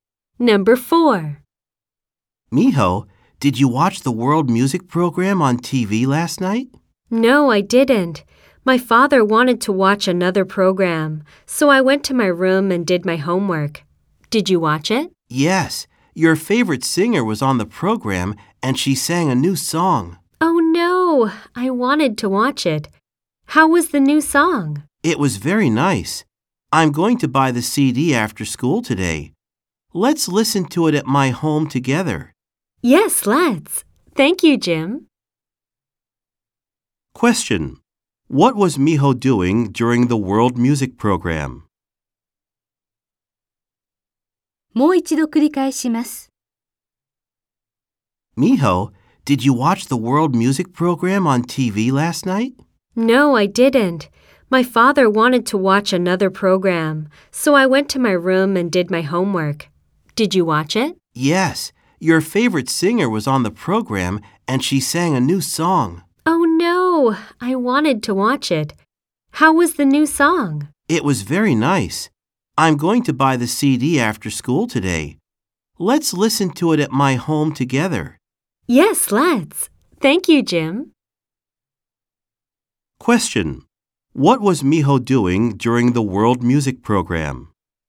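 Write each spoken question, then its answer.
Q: What was Miho doing during the World Music Program?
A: She was doing her homework in her room.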